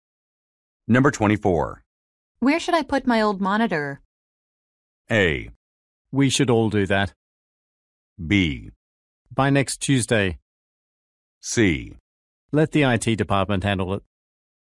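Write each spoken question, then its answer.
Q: Where should I put my old monitor?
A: C: Let the IT department handle it.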